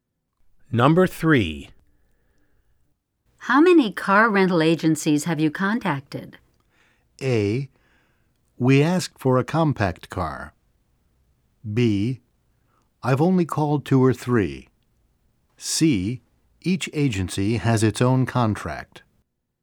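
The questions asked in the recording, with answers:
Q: How many car rental agencies have you contacted?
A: B: I've only called 2 or 3.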